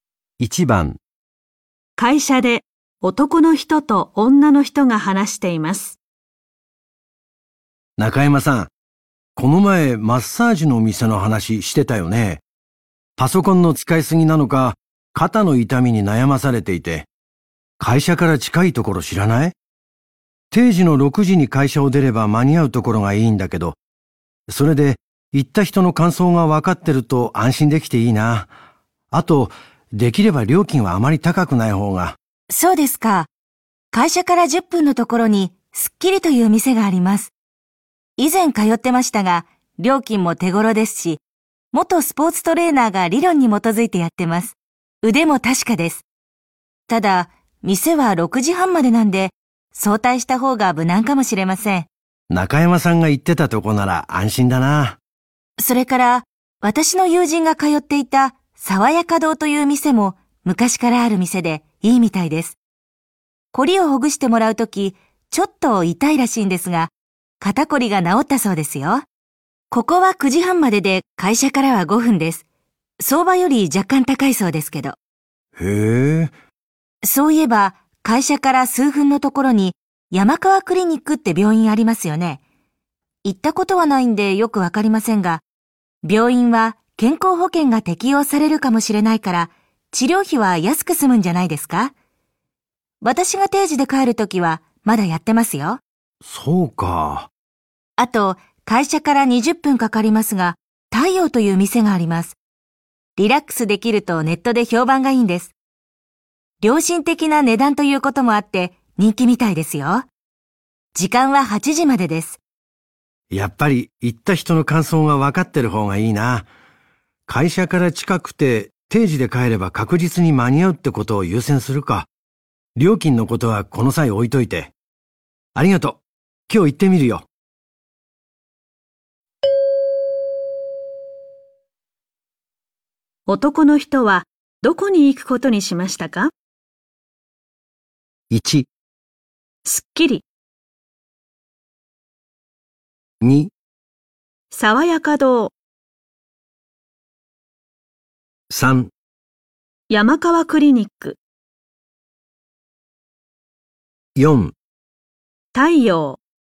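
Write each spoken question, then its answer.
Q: 男の人はどこに行くことにしましたか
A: 2: 爽やか堂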